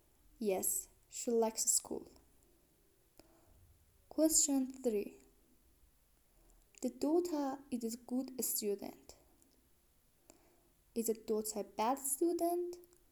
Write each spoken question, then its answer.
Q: Is the daughter a bad student?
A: No, the daughter is not a bad student.